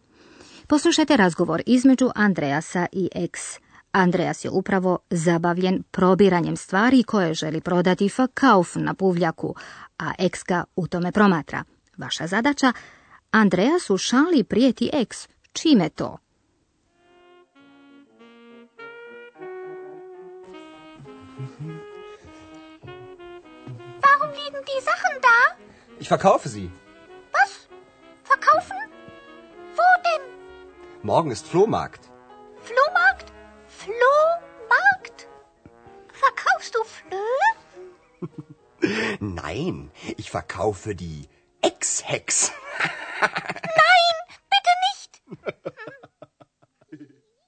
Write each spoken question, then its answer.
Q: Vaša zadaća, Andreas u šali prijeti X Čime to?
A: Andreas prijeti Eksta će i nju prodati kao i njegove stvari.